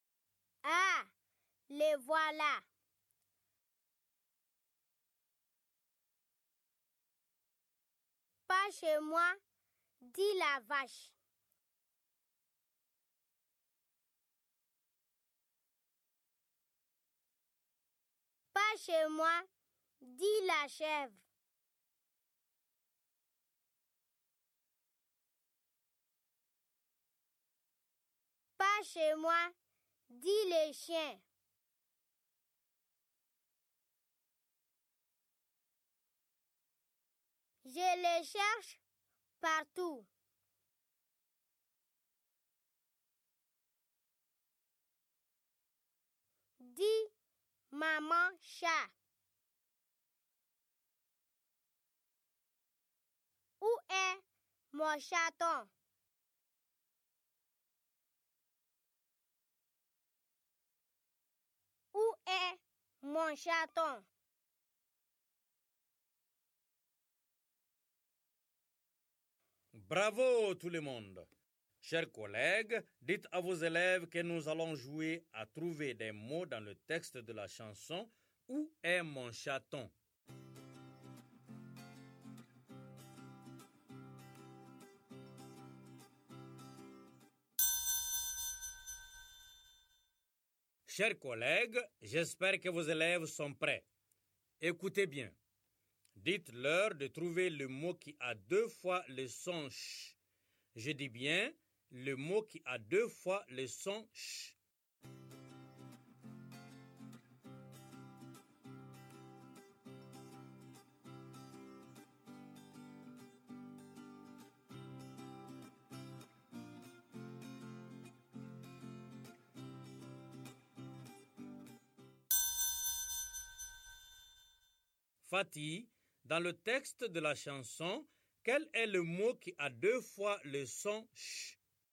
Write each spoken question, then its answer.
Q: Fatih, dans le texte de la chanson, quel est le mot qui a deux fois le son « ch » ?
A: Monsieur, c'est « cherche ».